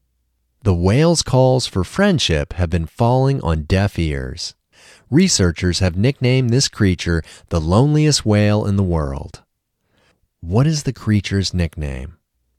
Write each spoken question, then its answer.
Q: What is the creature's nickname?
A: The creature's nickname is the loneliest whale in the world.